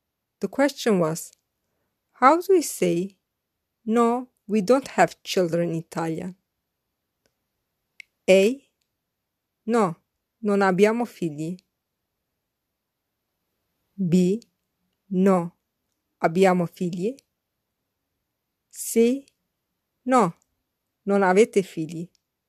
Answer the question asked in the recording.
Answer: The correct answer is A. No, non abbiamo figli.